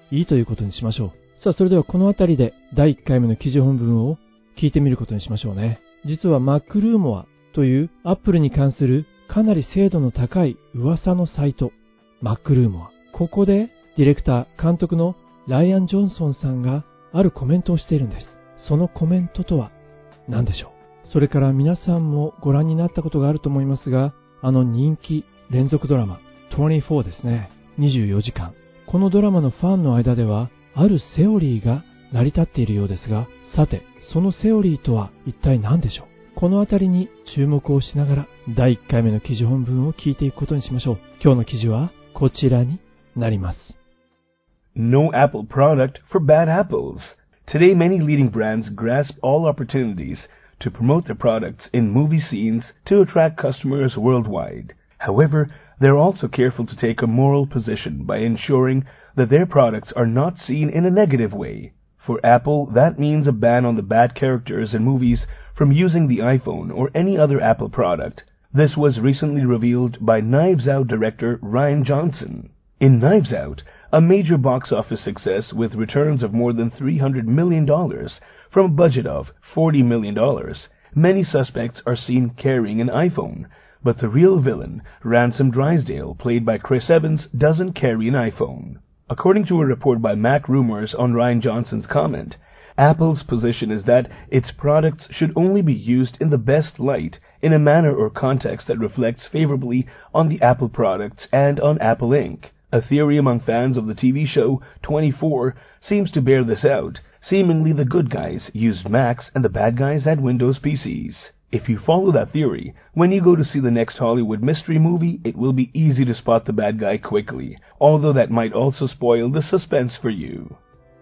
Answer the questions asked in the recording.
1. Apple's position is that its products should only be used in the best light.
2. Seemingly the good guys used Macs and the bad guys had Windows PCs.